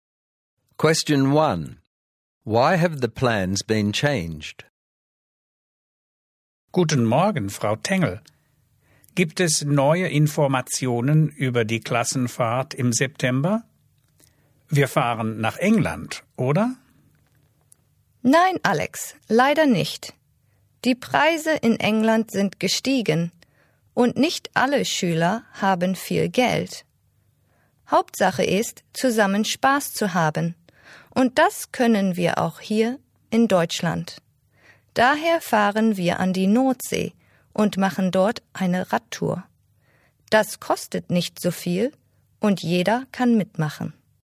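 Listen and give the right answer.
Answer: Prices in England have risen and not all students have much money, so they go to the North Sea for a cheaper bike tour everyone can join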